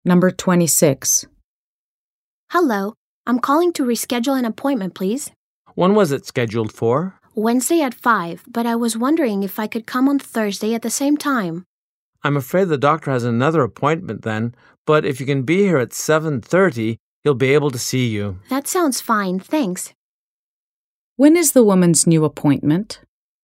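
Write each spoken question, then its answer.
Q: When is the woman's new appointment?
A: Thursday at 7:30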